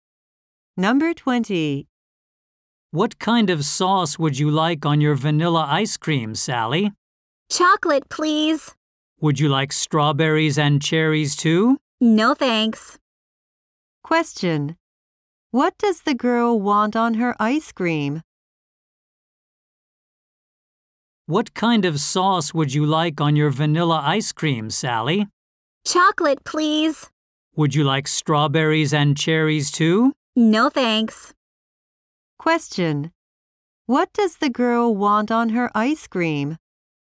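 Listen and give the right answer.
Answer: Chocolate sauce.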